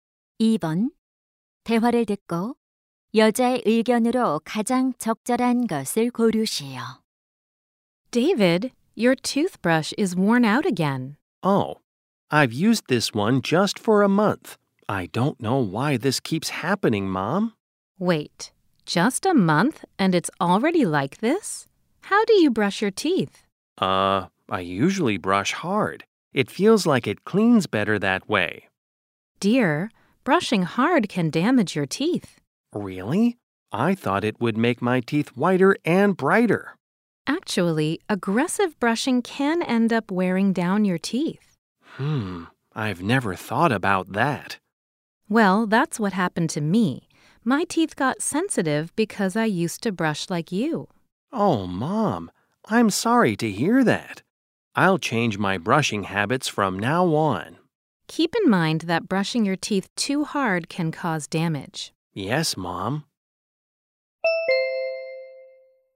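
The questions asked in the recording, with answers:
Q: 대화를 듣고 여자의 의견으로 가장 적절한 것을 고르시오.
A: 이를 너무 세게 닦으면 치아가 손상될 수 있다.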